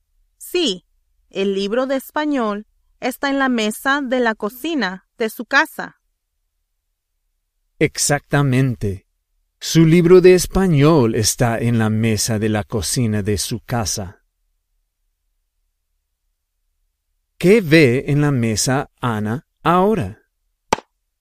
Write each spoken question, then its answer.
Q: ¿Qué ve en la mesa Ana ahora?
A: Ana ve su libro.